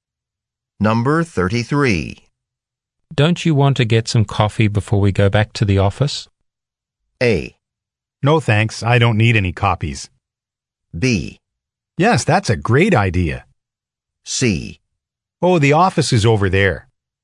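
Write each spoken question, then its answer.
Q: Don't you want to get some coffee before we go back to the office?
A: B: Yes, that's a great idea.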